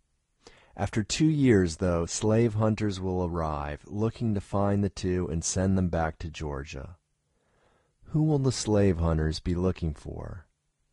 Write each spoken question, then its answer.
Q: Who will the slave hunters be looking for?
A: The slave hunters will be looking for Ellen and William.